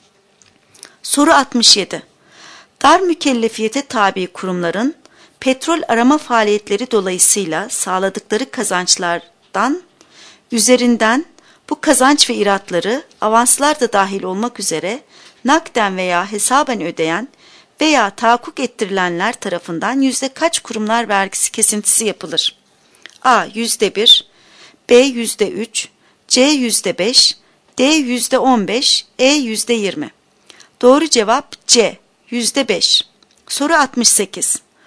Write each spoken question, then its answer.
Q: Dar mükellefiyete tabi kurumların petrol arama faaliyetleri dolayısıyla sağladıkları kazançlardan üzerinden bu kazanç ve iratları avanslar da dahil olmak üzere nakden veya hesaben ödeyen veya tahakkuk ettirilenler tarafından yüzde kaç kurumlar vergisi kesintisi yapılır?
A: Doğru cevap C. %5.